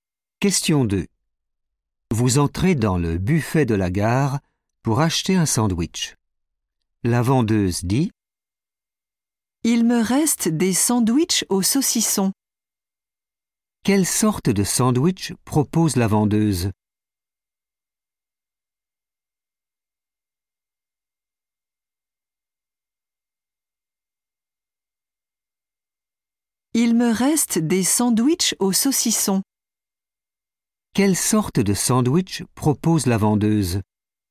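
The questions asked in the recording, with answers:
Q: Quelle sorte de sandwich propose la vendeuse ?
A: sandwich au saucisson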